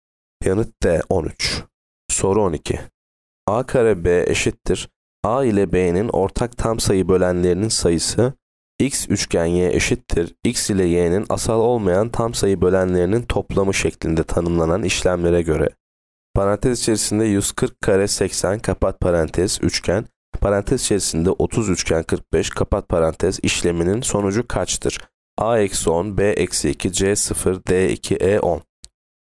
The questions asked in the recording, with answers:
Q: Parantez içerisinde 30 üçgen 45 kapat parantez işleminin sonucu kaçtır?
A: Yanıt B eksi 2.